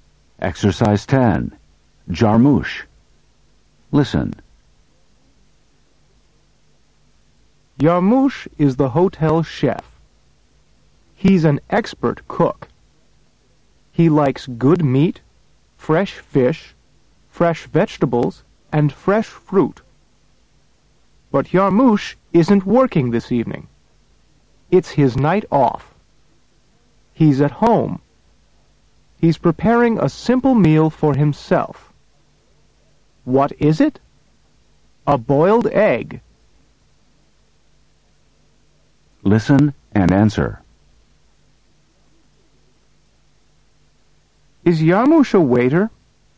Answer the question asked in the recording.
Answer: No, he isn't.